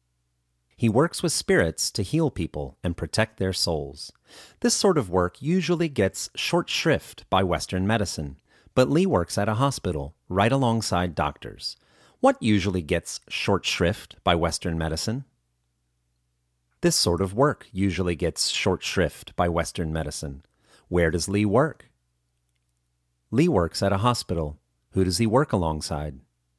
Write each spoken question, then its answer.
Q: Where does Li work?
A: Li works at a hospital.